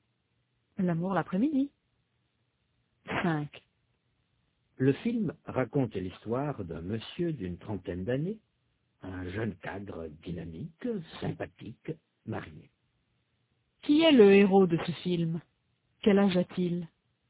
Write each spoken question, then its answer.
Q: Qui est le héros de ce film?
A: C'est un monsieur d'une trentaine d'années, un jeune cadre dynamique, sympathique, marié.

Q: Quel âge a-t-il?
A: C'est un monsieur d'une trentaine d'années